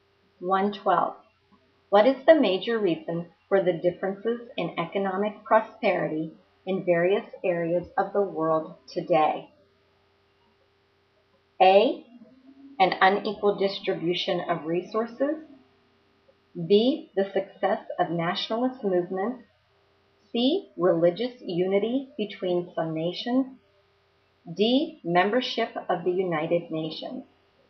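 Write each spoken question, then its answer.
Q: What is the major reason for the differences in economic prosperity in various areas of the world today?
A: A: An unequal distribution of resources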